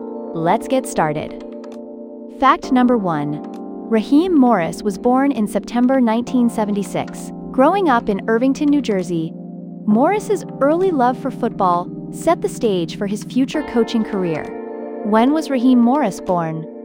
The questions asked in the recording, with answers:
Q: When was Raheem Morris born?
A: Correct answer, September 1976.